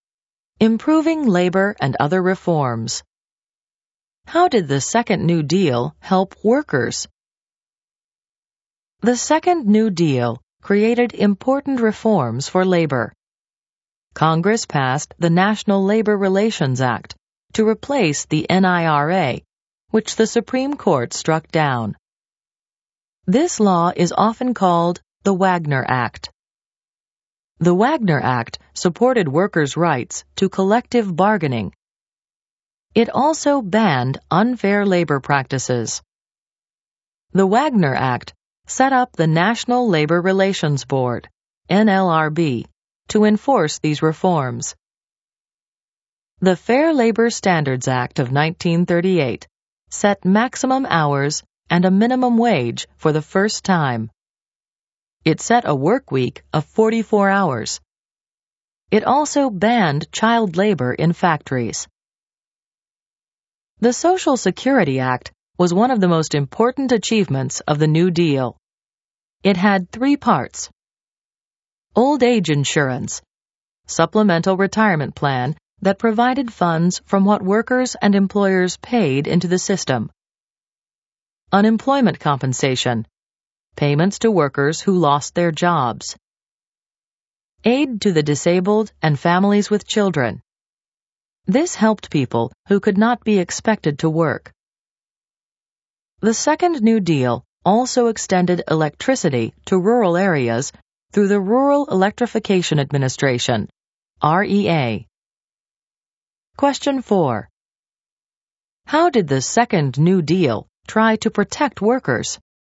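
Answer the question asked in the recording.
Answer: The Wagner Act protected collective bargaining, and the Fair Labor Standards Act set maximum hours, a minimum wage and banned child labor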